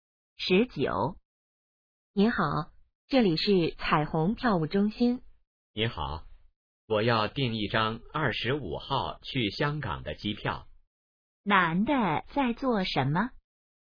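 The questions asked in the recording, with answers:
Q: 男的在做什么?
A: 订机票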